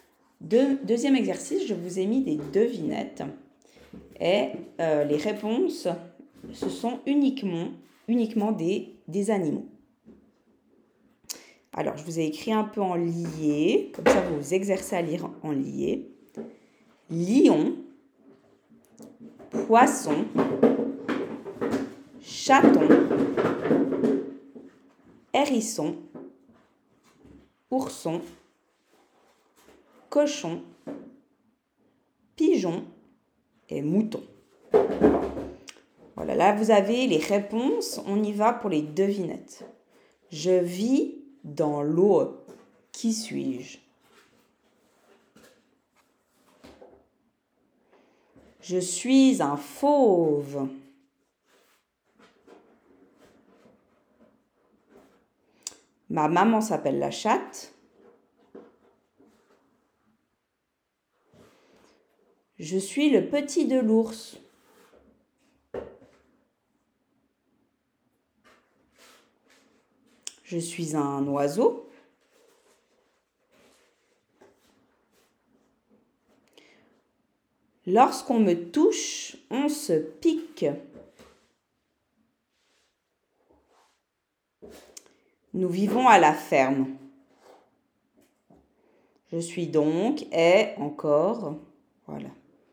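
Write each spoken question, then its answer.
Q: Je vis dans l'eau. Qui suis-je?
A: poisson

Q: Je suis un fauve.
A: lion

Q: Ma maman s'appelle la chatte.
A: chaton

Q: Je suis le petit de l'ours.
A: ourson

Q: Je suis un oiseau.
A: pigeon

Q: Lorsqu'on me touche, on se pique.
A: hérisson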